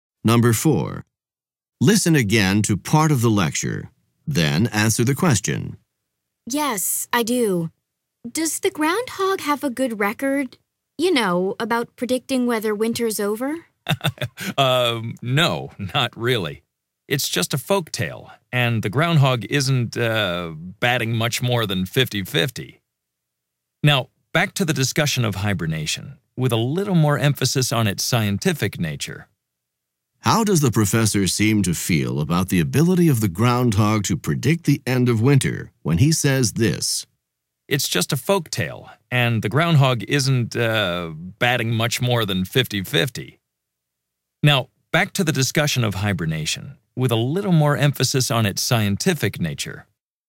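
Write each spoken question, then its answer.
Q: How does the professor seem to feel about the ability of the groundhog to predict the end of winter when he says this?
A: He is skeptical; he thinks it is just a folktale and not reliable.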